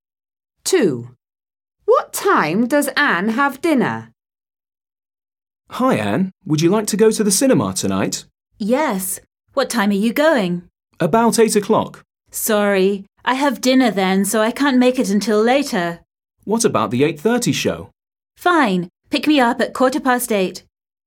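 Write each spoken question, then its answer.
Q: What time does Anne have dinner?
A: At about 8 o'clock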